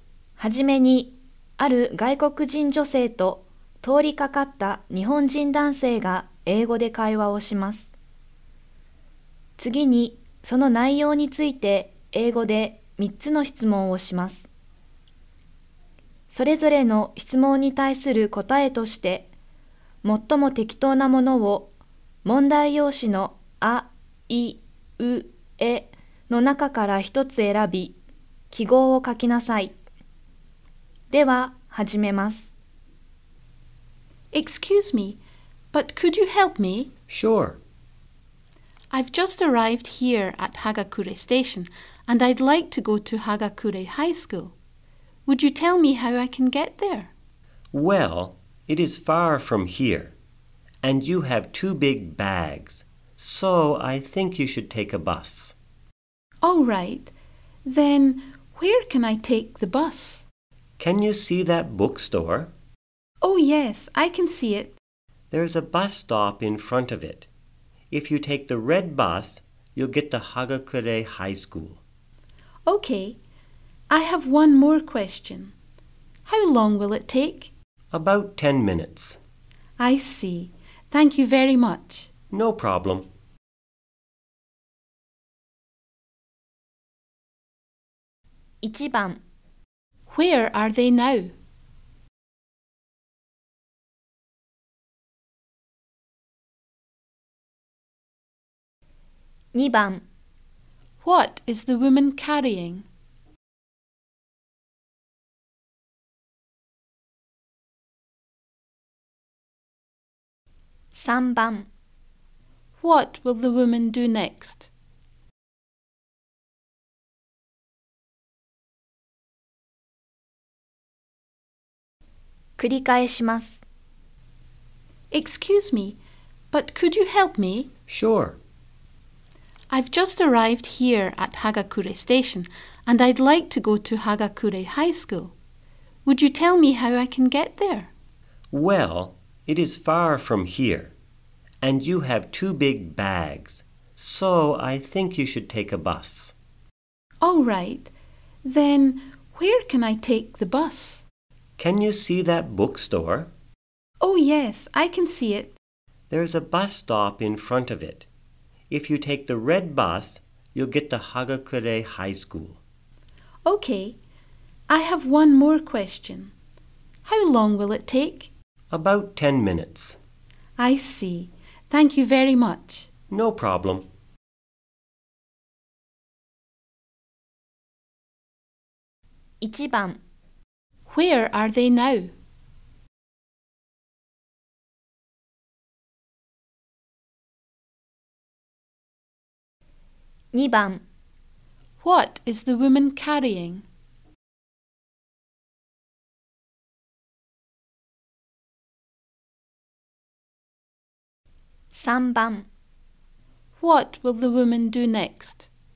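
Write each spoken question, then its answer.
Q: Where are they now?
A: At Hagakure Station.

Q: What is the woman carrying?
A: Two big bags.

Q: What will the woman do next?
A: Take the red bus at the bus stop in front of the bookstore.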